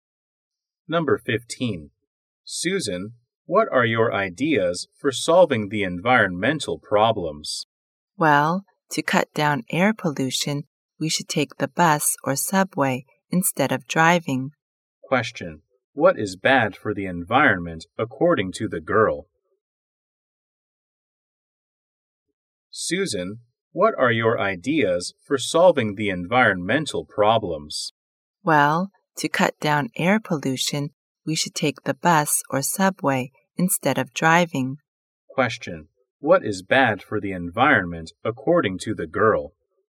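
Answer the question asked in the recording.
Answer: Driving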